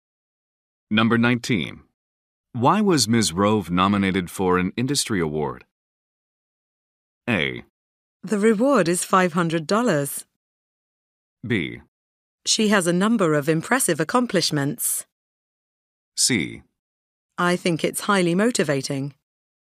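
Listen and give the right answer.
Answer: B: She has a number of impressive accomplishments.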